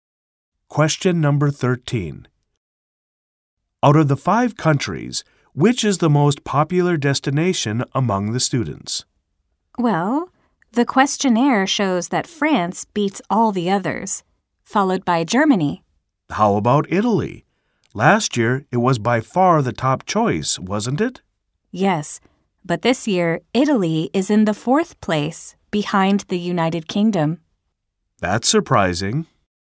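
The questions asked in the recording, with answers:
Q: Out of the 5 countries, which is the most popular destination among the students?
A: France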